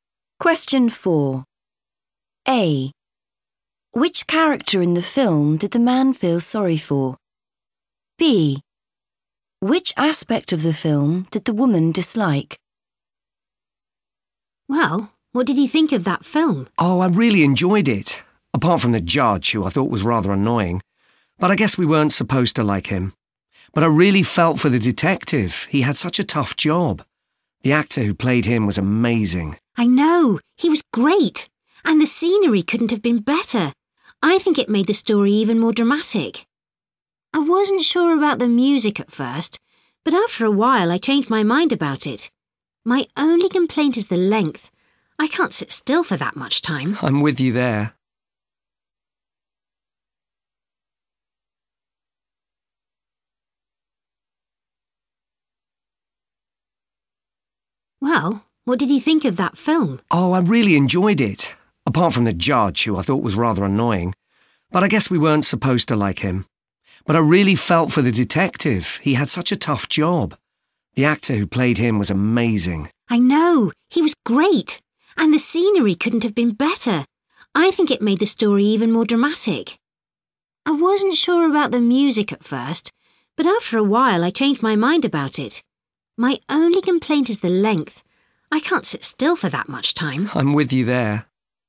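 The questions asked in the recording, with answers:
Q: Which character in the film did the man feel sorry for?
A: the detective

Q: Which aspect of the film did the woman dislike?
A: the length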